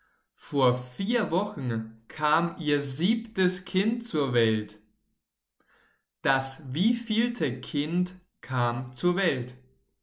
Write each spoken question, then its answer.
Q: Das wievielte Kind kam zur Welt?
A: Das siebte Kind. Vor vier Wochen kam ihr siebtes Kind zur Welt.